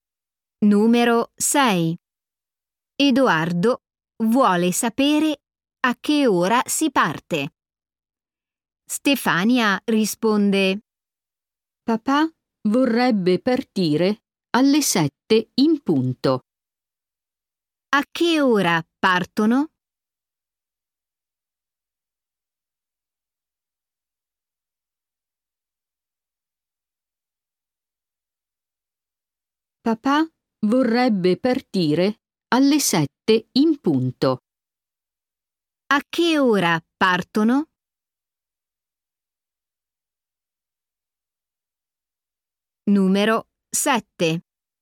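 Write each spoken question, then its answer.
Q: A che ora partono?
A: alle 7 in punto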